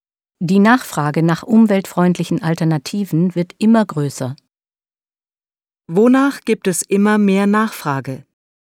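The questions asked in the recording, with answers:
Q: Wonach gibt es immer mehr Nachfrage?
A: Nach umweltfreundlichen Alternativen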